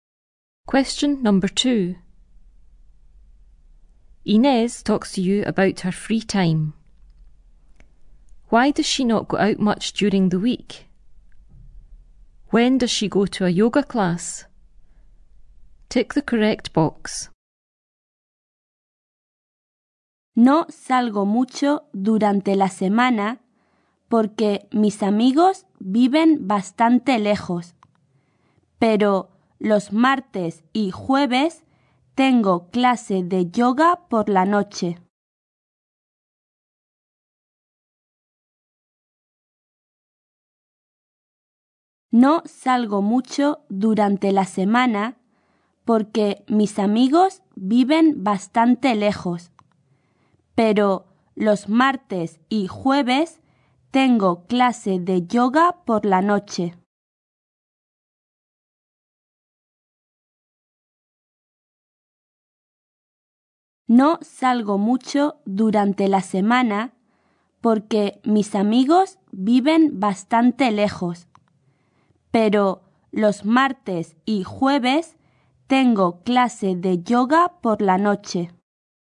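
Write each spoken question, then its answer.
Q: Why does she not go out much during the week?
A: Her friends live quite far away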